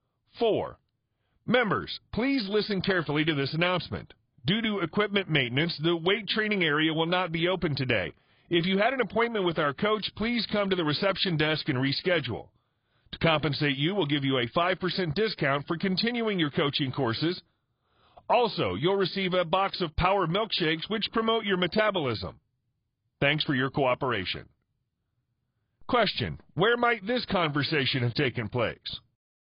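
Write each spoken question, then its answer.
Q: where might this conversation have taken place?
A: At a gym (fitness center)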